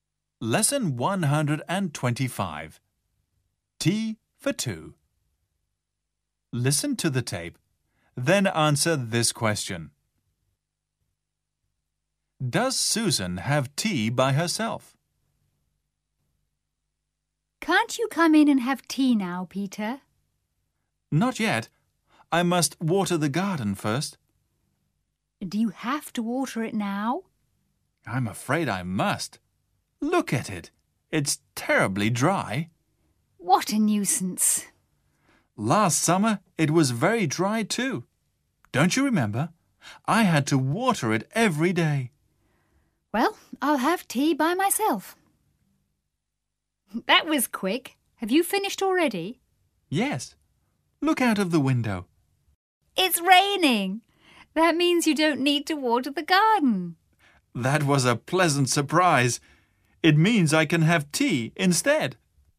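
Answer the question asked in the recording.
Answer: No, she doesn't. It starts raining, so Peter doesn't need to water the garden and has tea with her.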